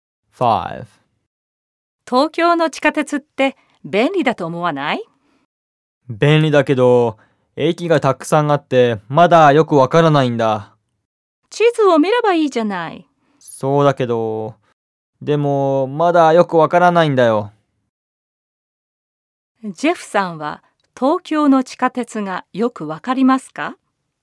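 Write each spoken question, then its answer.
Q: ジェフさんは東京の地下鉄がよくわかりますか?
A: いいえ、まだよくわかりません。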